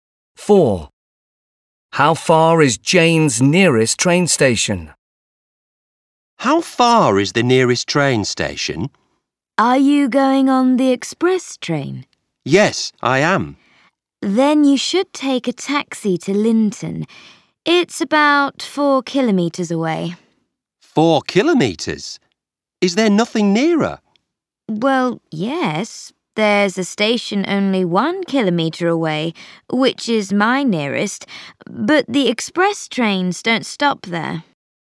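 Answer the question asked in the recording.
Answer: 1 kilometre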